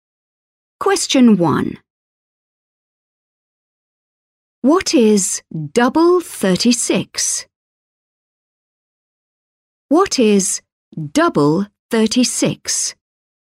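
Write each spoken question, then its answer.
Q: What is double 36?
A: 72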